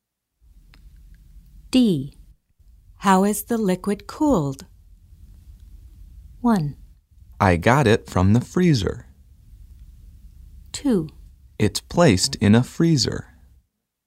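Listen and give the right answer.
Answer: 2: It's placed in a freezer.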